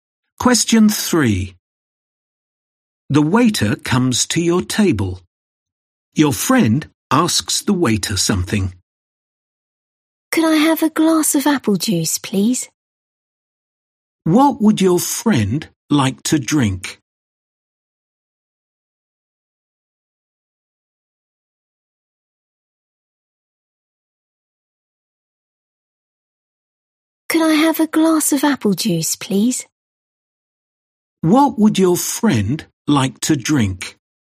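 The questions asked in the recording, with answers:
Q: What would your friend like to drink?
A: A glass of apple juice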